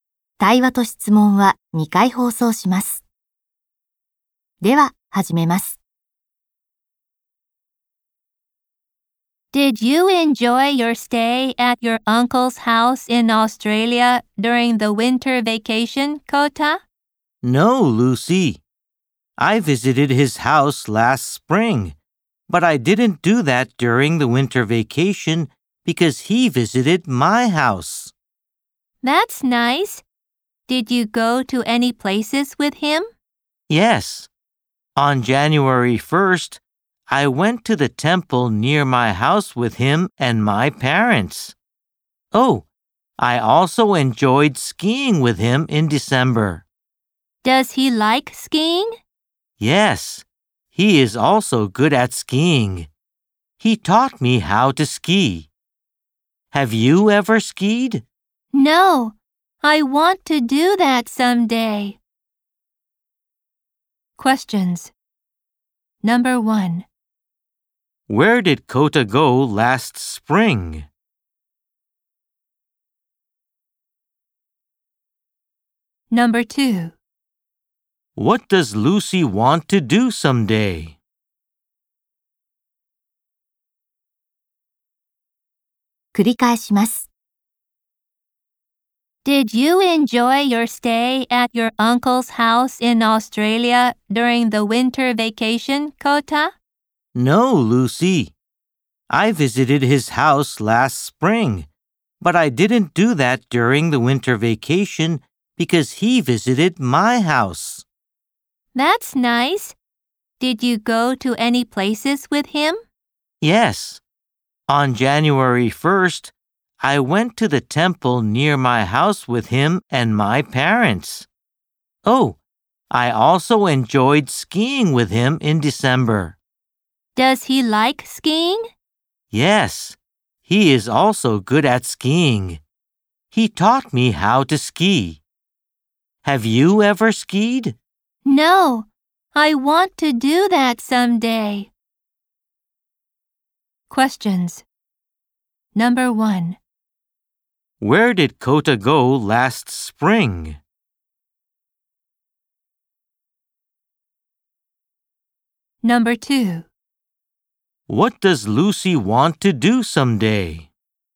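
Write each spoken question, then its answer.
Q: Where did Kota go last spring?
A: To his uncle's house in Australia

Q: What does Lucy want to do someday?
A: Ski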